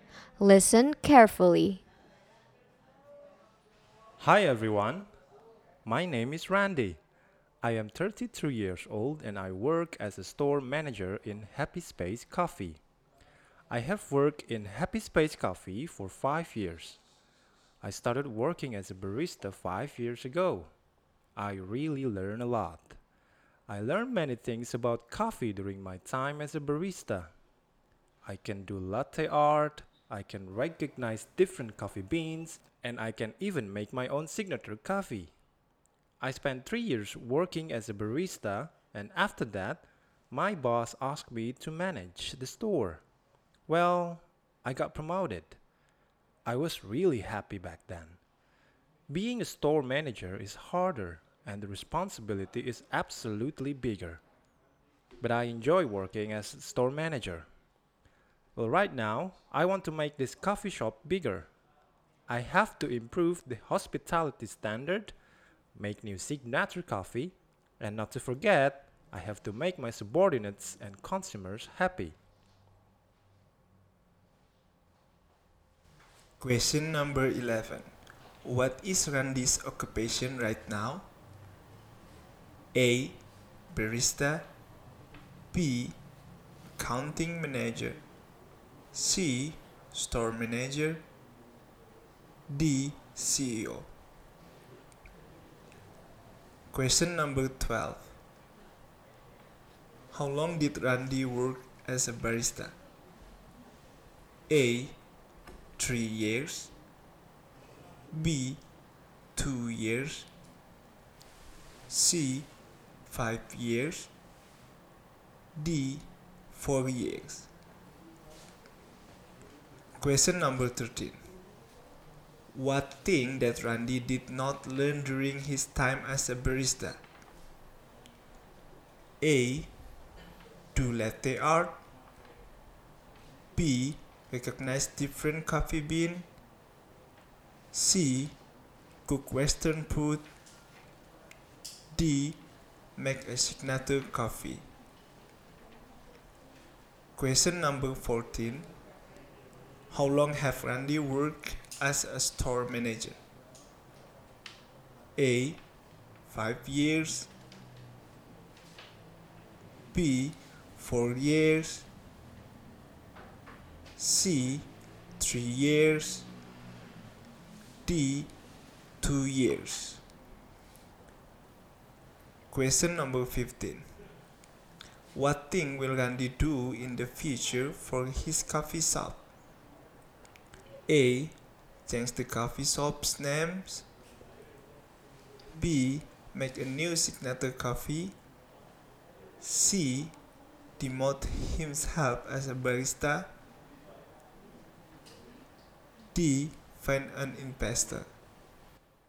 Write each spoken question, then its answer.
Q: What is Randy's occupation right now?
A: C. Store Manager.

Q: How long did Randy work as a barista?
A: Jawaban untuk nomor 12 adalah A.

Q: What thing that Randy did not learn during his time as a barista?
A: C. Cook Western food.

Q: How long have Randy worked as a store manager?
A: Jawaban untuk nomor 14 adalah D.

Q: What thing will Randy do in the future for his coffee shop?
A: jawaban untuk soal nomor 15 adalah B.